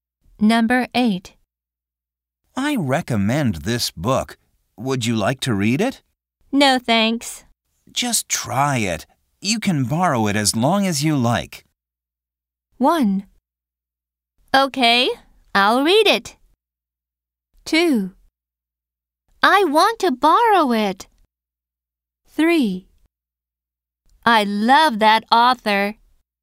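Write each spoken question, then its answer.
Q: Just try it. You can borrow it as long as you like.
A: 1: Okay, I'll read it.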